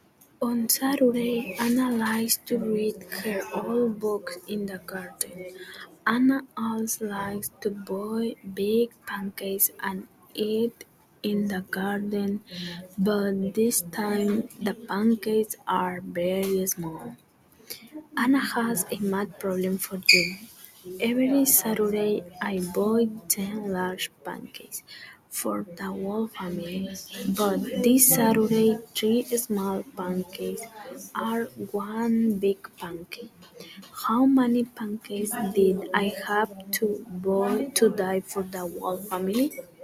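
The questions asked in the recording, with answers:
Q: How many pancakes did I have to buy to die for the whole family?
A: 30 small pancakes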